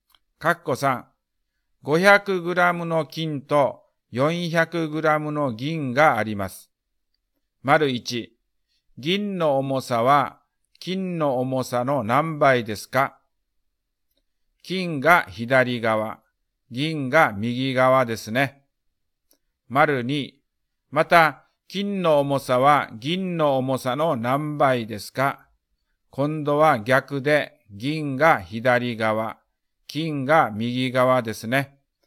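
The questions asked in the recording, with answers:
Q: 銀の重さは金の重さの何倍ですか?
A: 0.8倍

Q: また金の重さは銀の重さの何倍ですか?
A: 1.25倍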